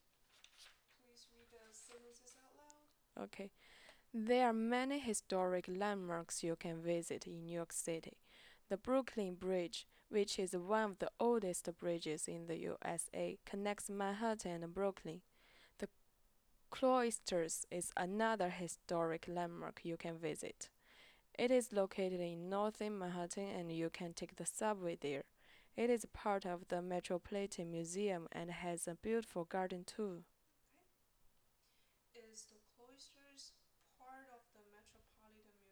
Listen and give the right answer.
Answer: Yes, the Cloisters is part of the Metropolitan Museum.